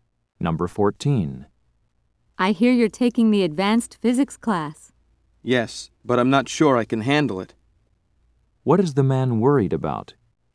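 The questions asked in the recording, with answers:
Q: What is the man worried about?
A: That the advanced physics class may be too hard for him.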